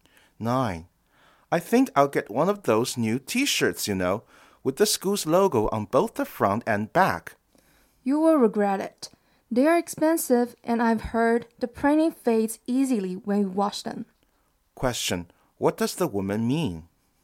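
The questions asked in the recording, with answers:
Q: What does the woman mean?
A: He shouldn't buy the T-shirt.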